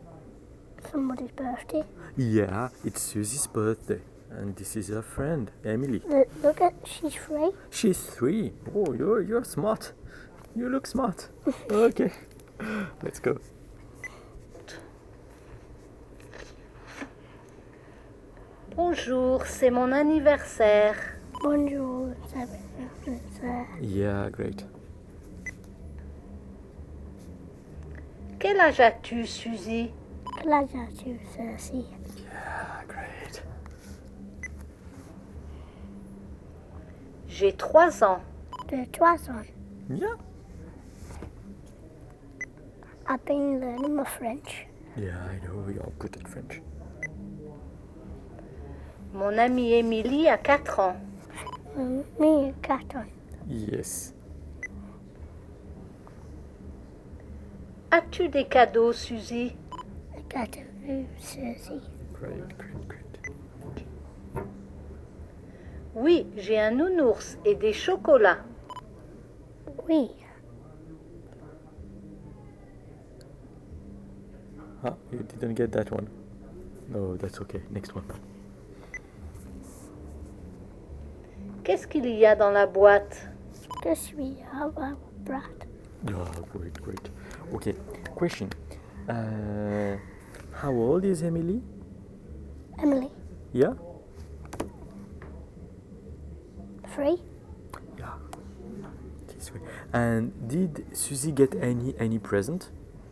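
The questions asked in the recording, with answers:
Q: And did Suzy get any present?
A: Yes, a teddy bear and chocolates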